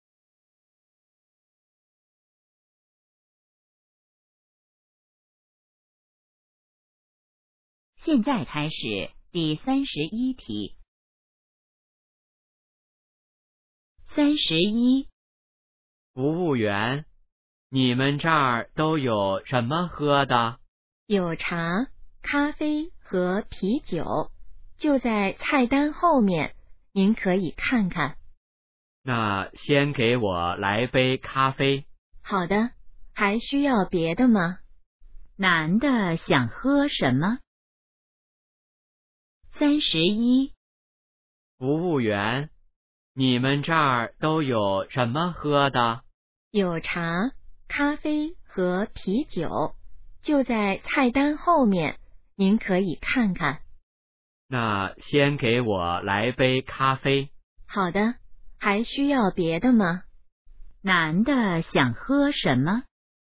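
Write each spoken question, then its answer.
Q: 男的想喝什么?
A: 咖啡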